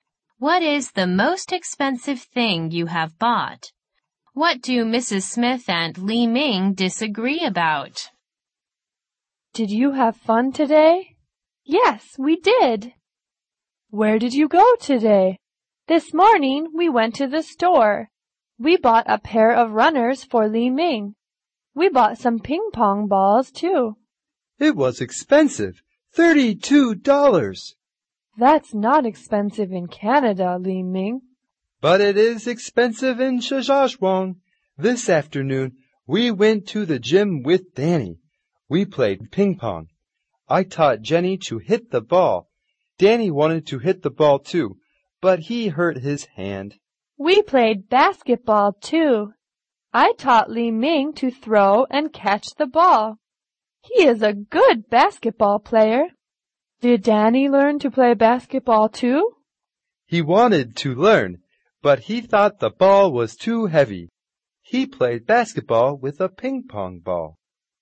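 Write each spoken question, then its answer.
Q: What do Mrs. Smith and Li Ming disagree about?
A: Whether the runners and ping pong balls ($32) were expensive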